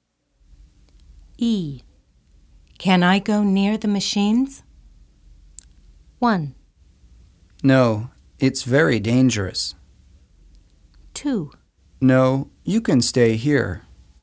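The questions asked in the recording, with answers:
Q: Can I go near the machines?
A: 1: No, it's very dangerous.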